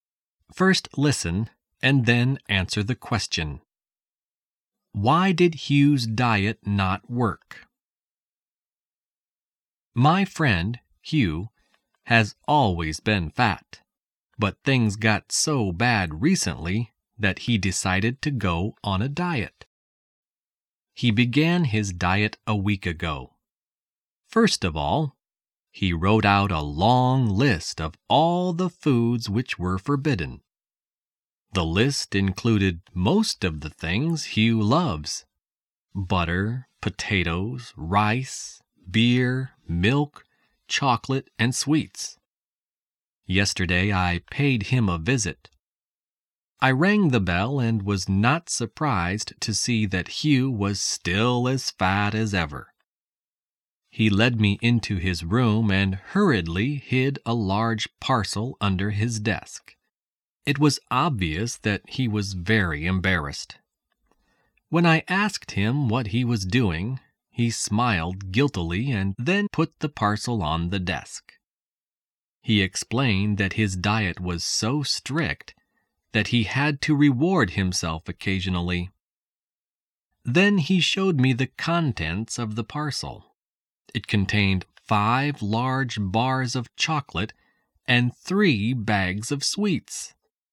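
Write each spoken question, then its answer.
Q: Why did Hugh's diet not work?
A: He kept rewarding himself with chocolate and sweets.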